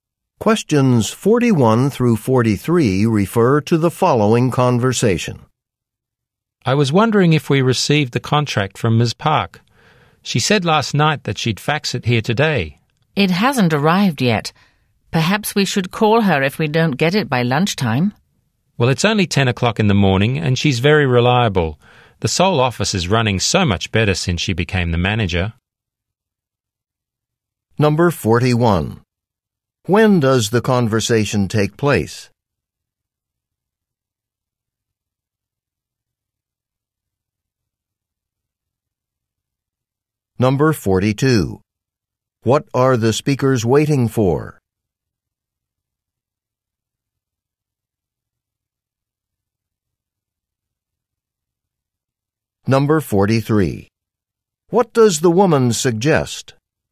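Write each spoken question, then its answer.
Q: When does the conversation take place?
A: In the morning, at about 10 o'clock

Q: What are the speakers waiting for?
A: A contract from Ms. Park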